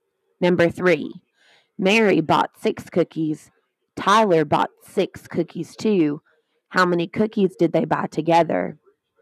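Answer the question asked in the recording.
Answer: 12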